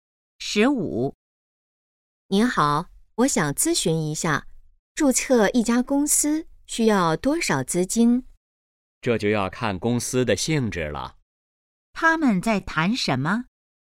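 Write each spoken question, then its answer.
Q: 他们在谈什么?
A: 注册公司需要多少资金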